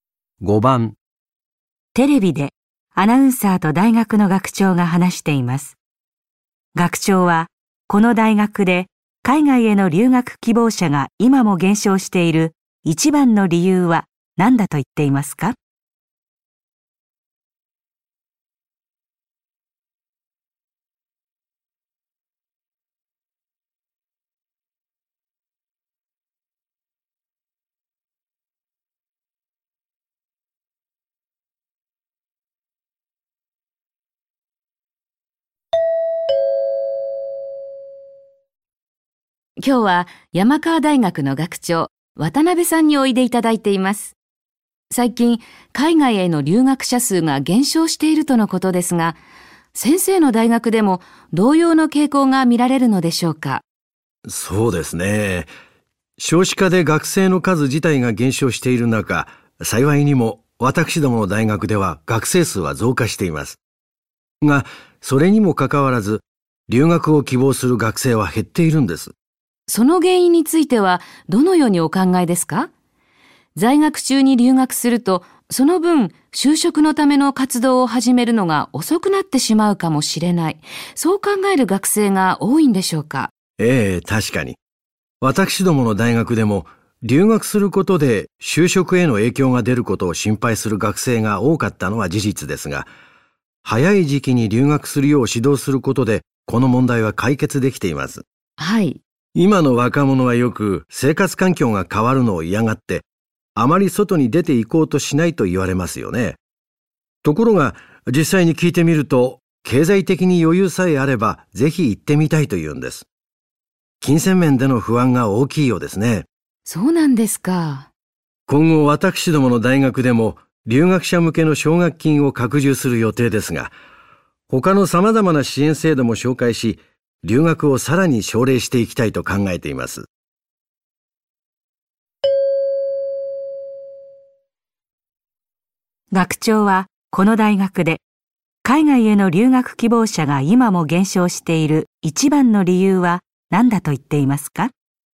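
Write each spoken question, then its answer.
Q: 学長はこの大学で海外への留学希望者が今も減少している一番の理由は何だと言っていますか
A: 経済的な(金銭面での)不安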